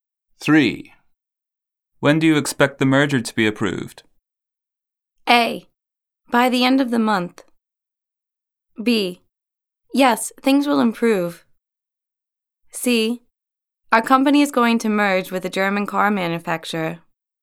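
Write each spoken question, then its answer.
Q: When do you expect the merger to be approved?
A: A: By the end of the month.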